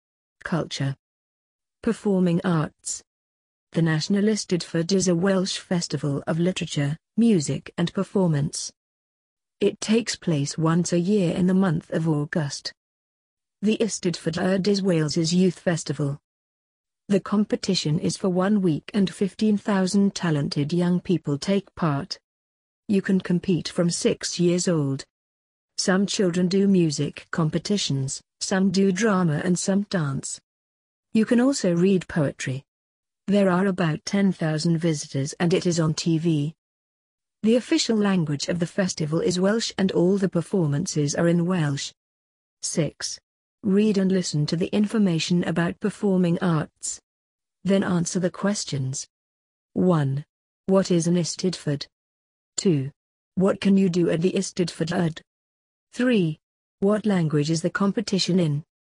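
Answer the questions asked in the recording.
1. A Welsh festival of literature, music and performance
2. Music, drama and dance competitions, and read poetry
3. Welsh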